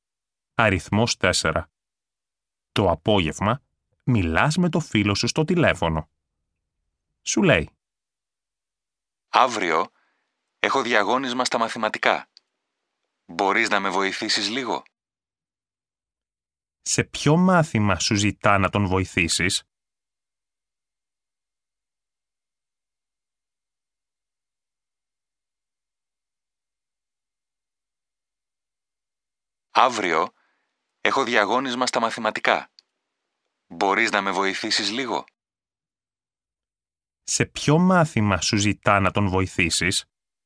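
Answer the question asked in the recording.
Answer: Στα μαθηματικά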